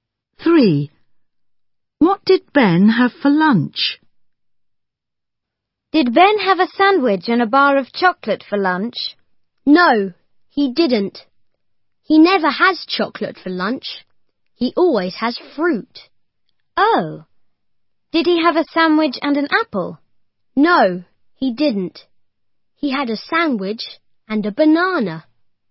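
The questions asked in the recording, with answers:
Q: What did Ben have for lunch?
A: a sandwich and a banana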